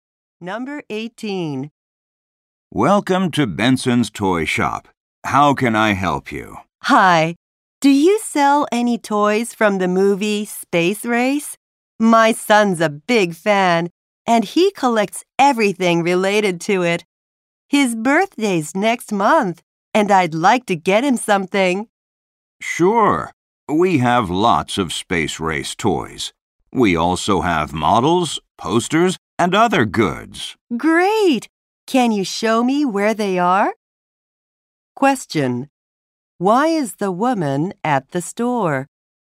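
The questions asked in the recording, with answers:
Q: Why is the woman at the store?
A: To buy a Space Race toy for her son's birthday.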